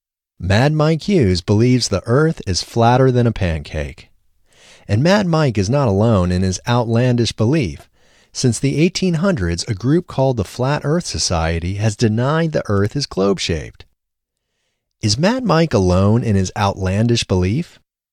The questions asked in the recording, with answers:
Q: Is Mad Mike alone in his outlandish belief?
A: No, Mad Mike isn't alone in his outlandish belief.